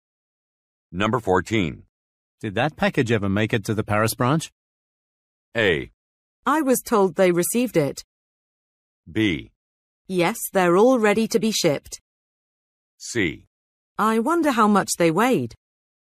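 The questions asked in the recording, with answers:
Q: Did that package ever make it to the Paris branch?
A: A: I was told they received it.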